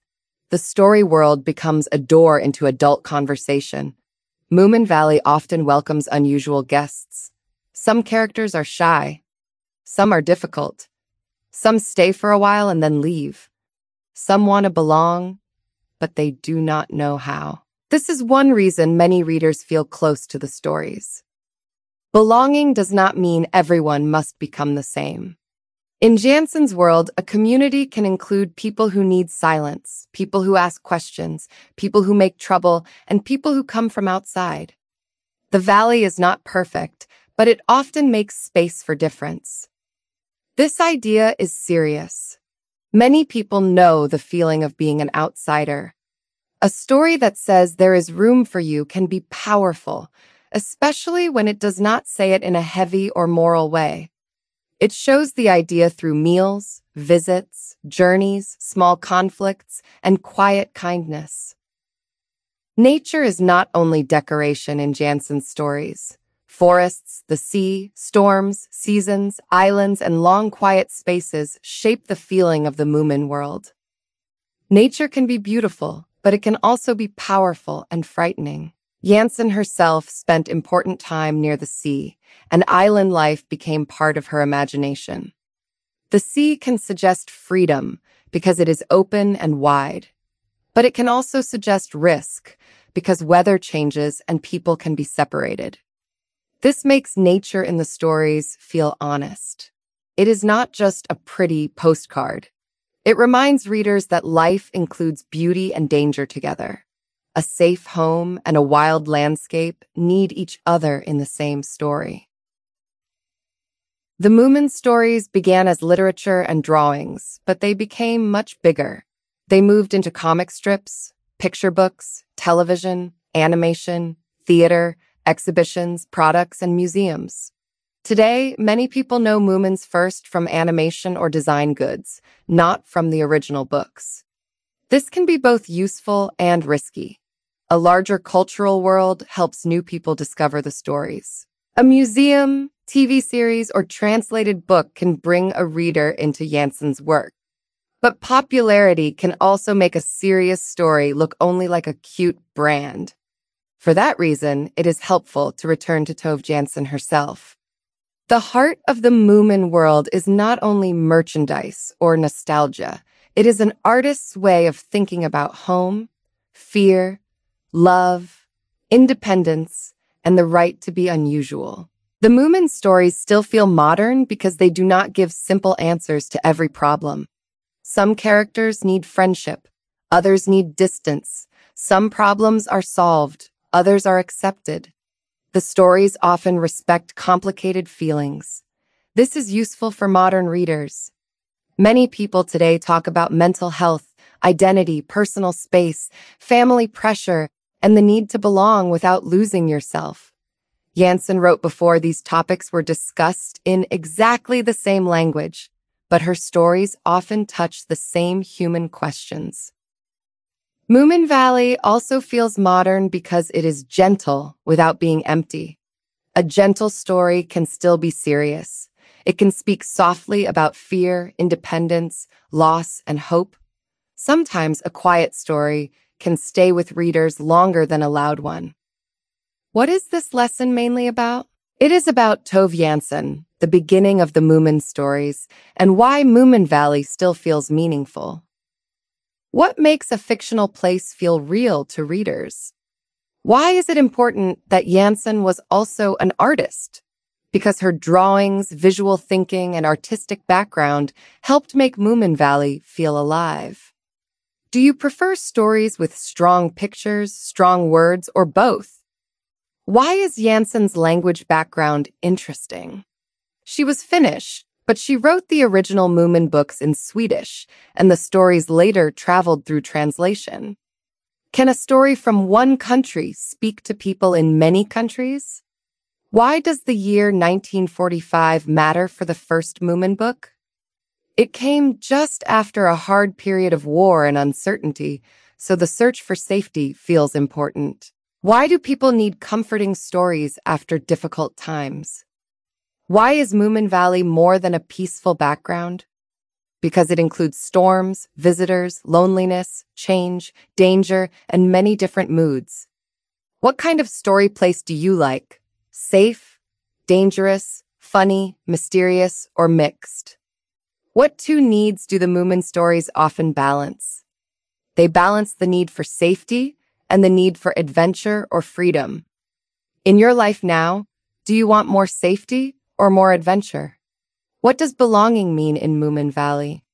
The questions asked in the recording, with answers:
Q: What does belonging mean in Moomin Valley?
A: It means people can be different and still have a place in the community.